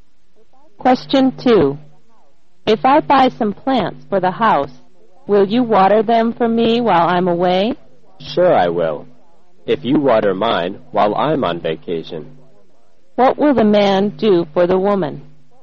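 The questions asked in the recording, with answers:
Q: What will the man do for the woman?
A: Water her plants while she is away.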